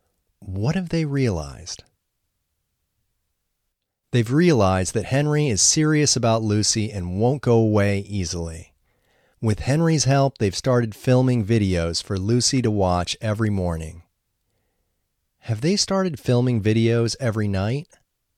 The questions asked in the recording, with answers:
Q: Have they started filming videos every night?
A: No, they haven't started filming videos every night.